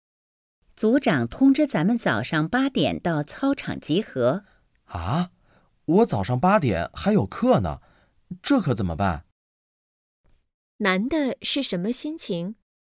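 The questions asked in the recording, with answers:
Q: 难的是什么心情?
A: 着急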